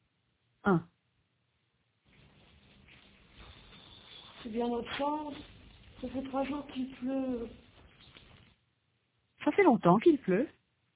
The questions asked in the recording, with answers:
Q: Ça fait longtemps qu'il pleut.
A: 3 jours. Ça fait 3 jours qu'il pleut.